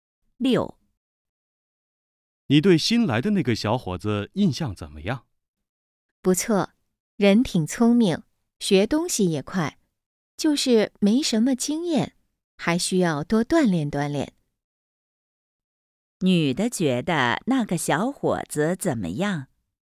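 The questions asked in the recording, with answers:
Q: 女的觉得那个小伙子怎么样?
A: 聪明,学得快,但没什么经验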